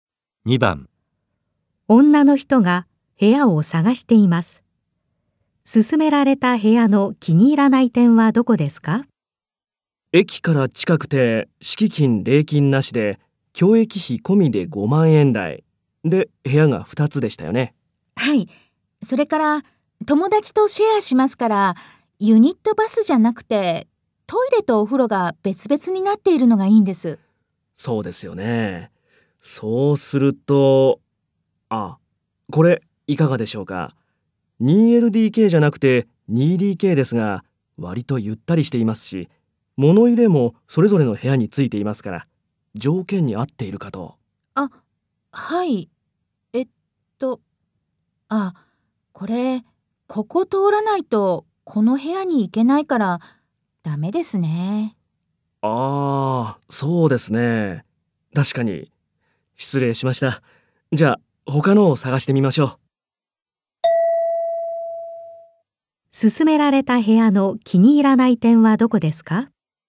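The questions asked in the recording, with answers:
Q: 勧められた部屋の気に入らない点はどこですか?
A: 一つの部屋を通らないともう一つの部屋に行けないこと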